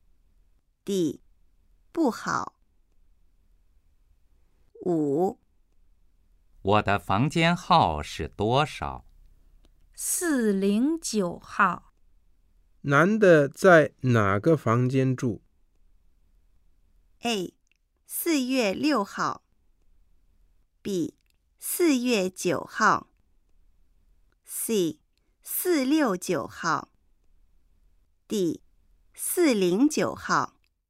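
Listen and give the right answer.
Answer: D: 409号。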